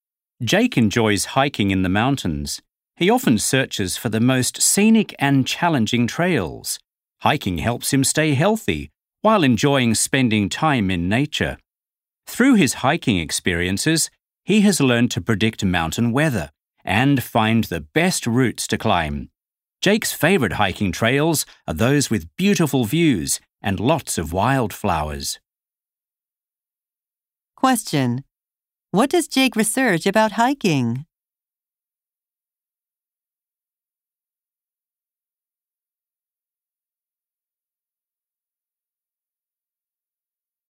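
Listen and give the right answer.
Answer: The most scenic and challenging trails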